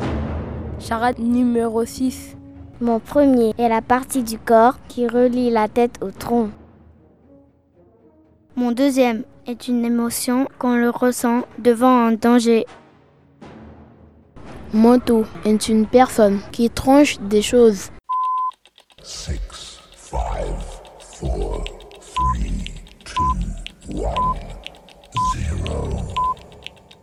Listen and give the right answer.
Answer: un coupeur.